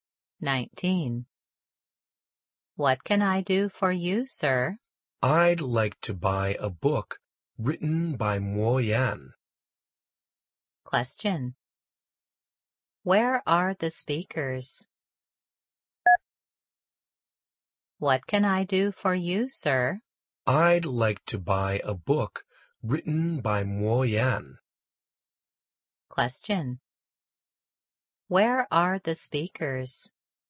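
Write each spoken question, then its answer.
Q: Where are the speakers?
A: In a bookstore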